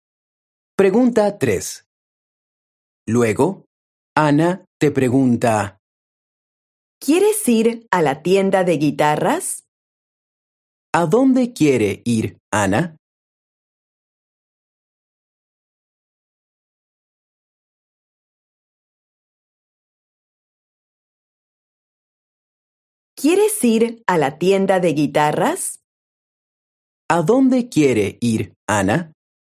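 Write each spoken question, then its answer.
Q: ¿A dónde quiere ir Ana?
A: A la tienda de guitarras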